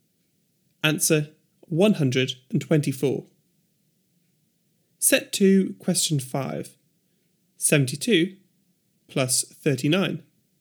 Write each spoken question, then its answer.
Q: 72 plus 39.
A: 111.